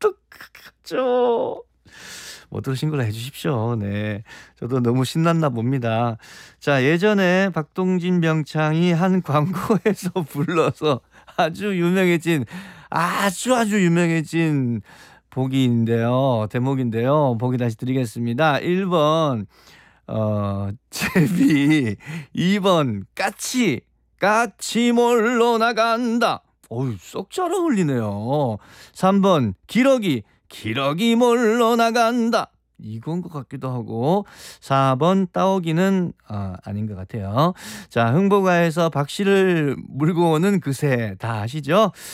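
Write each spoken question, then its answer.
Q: 자, 흥보가에서 박씨를 물고 오는 그새 다 아시죠?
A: 1번: 제비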